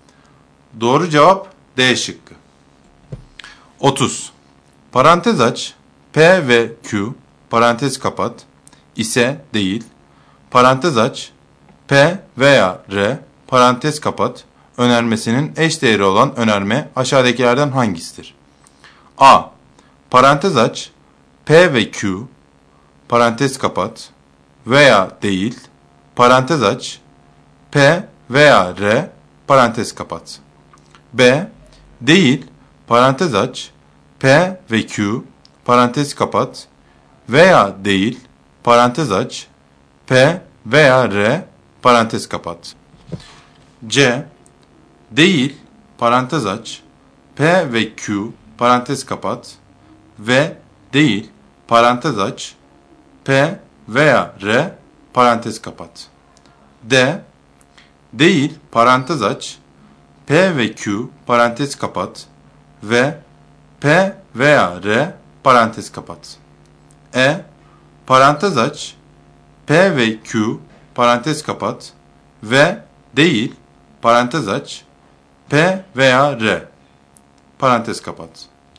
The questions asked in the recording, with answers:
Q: Parantez aç p veya r parantez kapat önermesinin eş değeri olan önerme aşağıdakilerden hangisidir?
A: Doğru cevap B şıkkı.